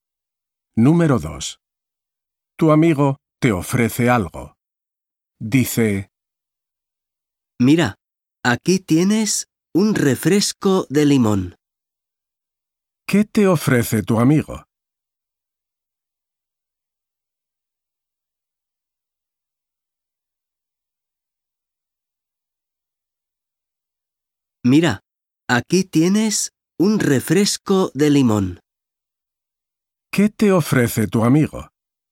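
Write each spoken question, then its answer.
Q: ¿Qué te ofrece tu amigo?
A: un refresco de limón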